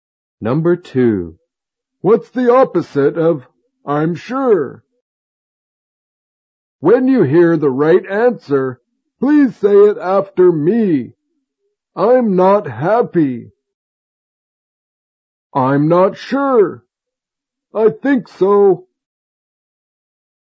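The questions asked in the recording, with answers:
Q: What's the opposite of I'm sure?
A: I'm not sure.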